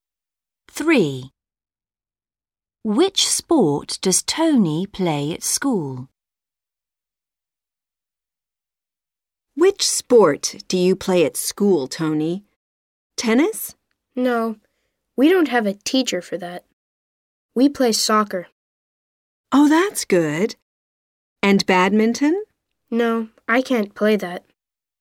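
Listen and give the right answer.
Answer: soccer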